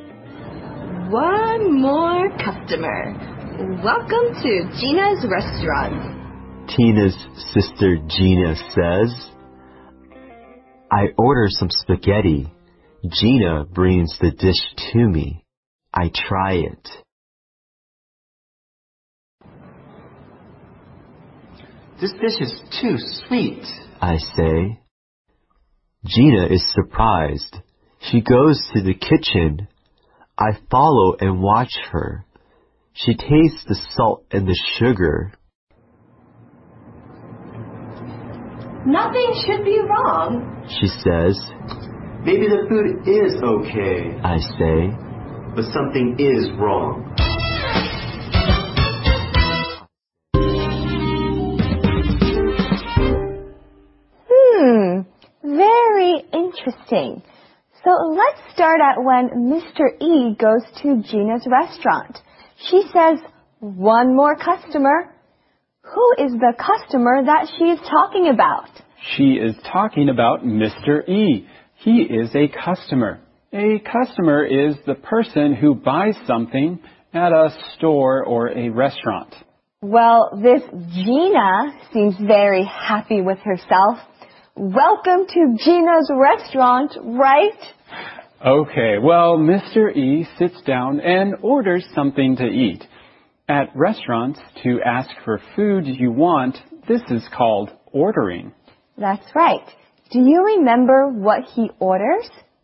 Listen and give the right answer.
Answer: He orders some spaghetti.